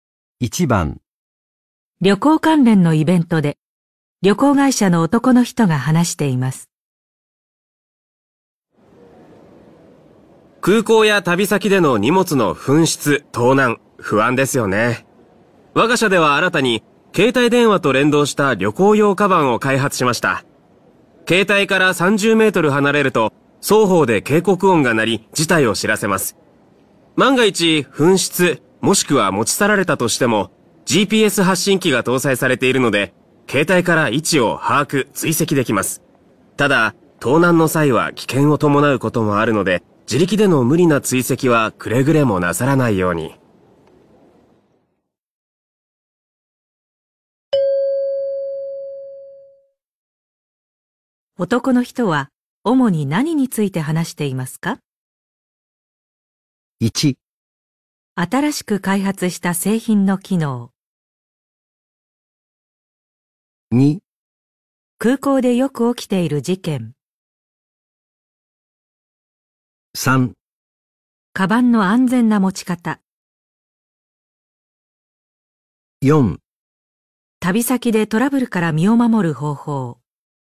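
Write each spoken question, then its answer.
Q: 男の人は主に何について話していますか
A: 1: 新しく開発した製品の機能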